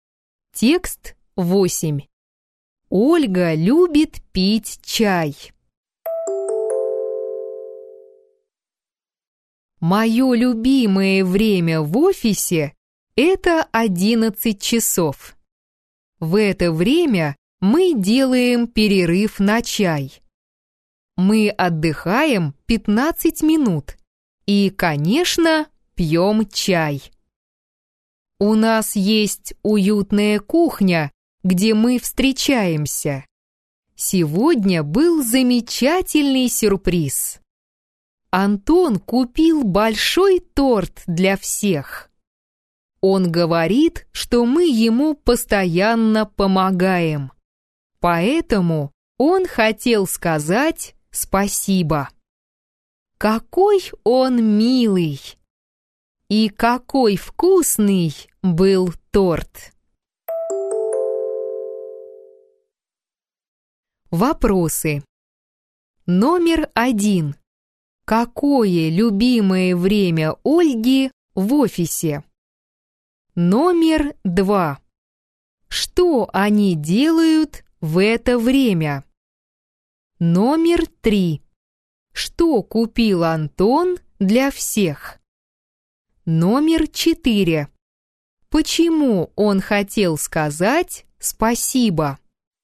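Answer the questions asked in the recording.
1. 11 часов
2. Делают перерыв на чай, отдыхают и пьют чай
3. Большой торт
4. Потому что они ему постоянно помогают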